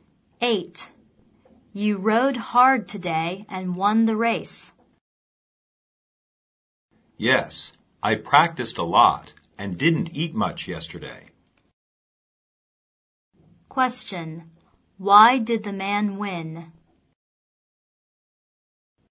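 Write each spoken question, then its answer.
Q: Why did the man win?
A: He practiced a lot and didn't eat much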